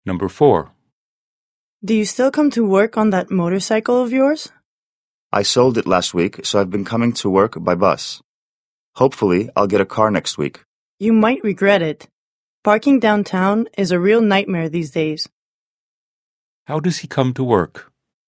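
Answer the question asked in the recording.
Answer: By bus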